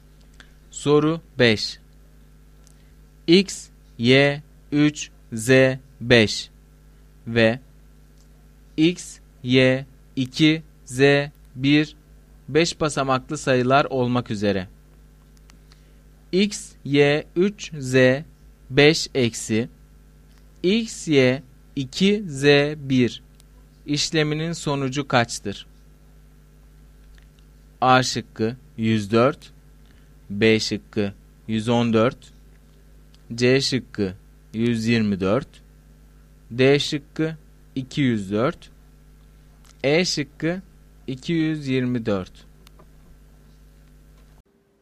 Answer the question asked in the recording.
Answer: Doğru cevap A şıkkı.